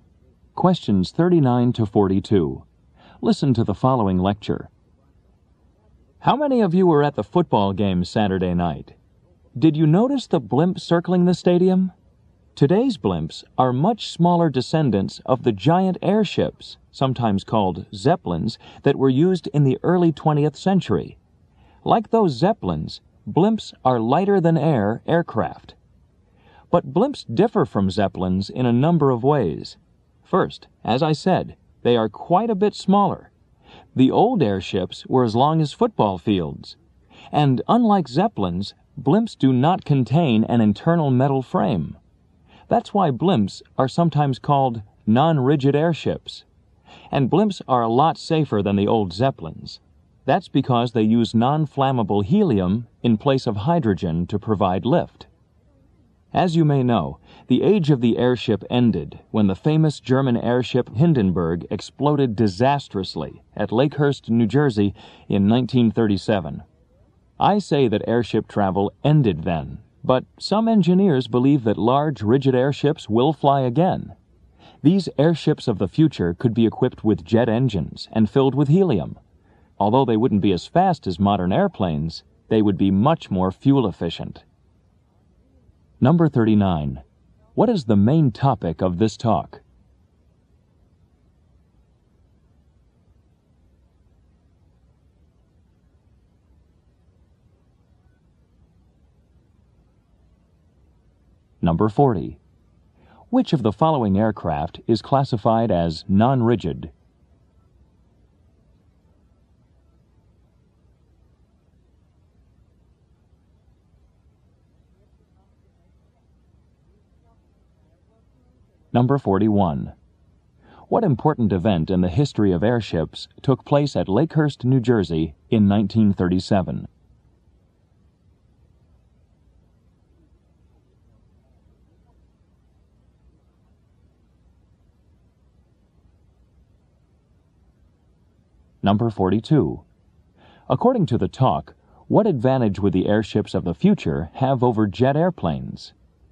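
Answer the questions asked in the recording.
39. Blimps and airships (zeppelins)
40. Blimps
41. The Hindenburg exploded
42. They would be much more fuel efficient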